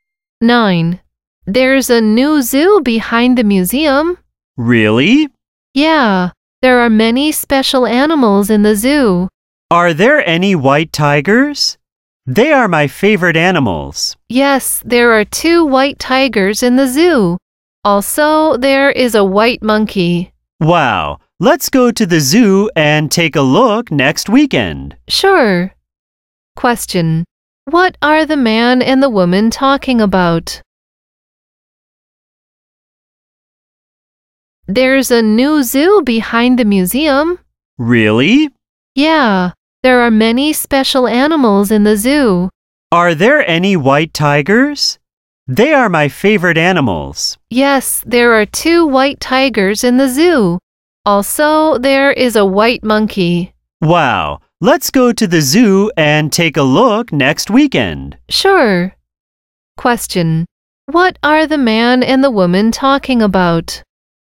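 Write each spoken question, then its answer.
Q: What are the man and the woman talking about?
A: A new zoo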